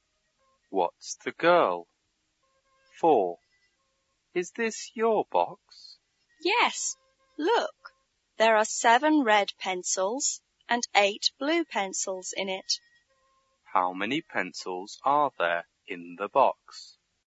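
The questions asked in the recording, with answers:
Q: How many pencils are there in the box?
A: 15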